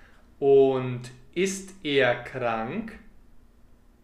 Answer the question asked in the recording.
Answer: Ja, er ist krank. Sein Fuß will einfach nicht heilen.